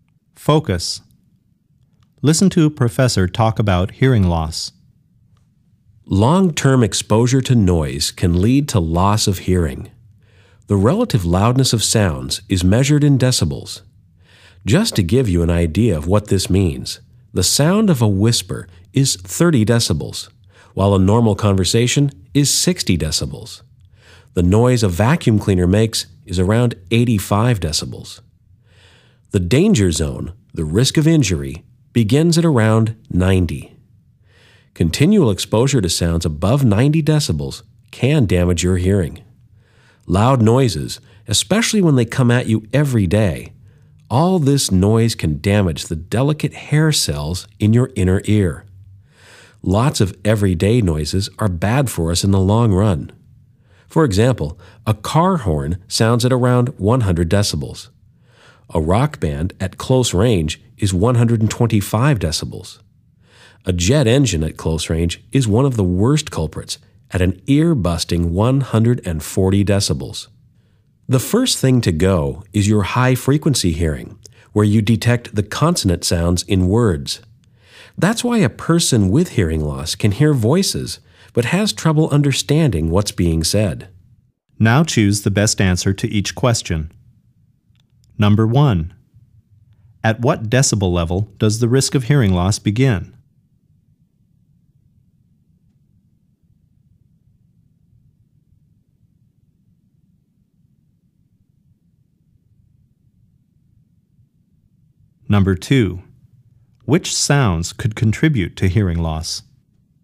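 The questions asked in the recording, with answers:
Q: At what decibel level does the risk of hearing loss begin?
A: Around 90 decibels

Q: Which sounds could contribute to hearing loss?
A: Car horns, rock bands at close range, jet engines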